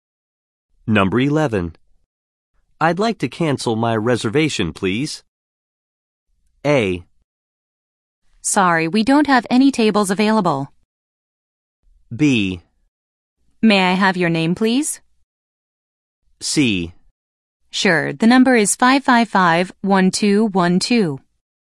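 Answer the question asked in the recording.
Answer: B: May I have your name, please?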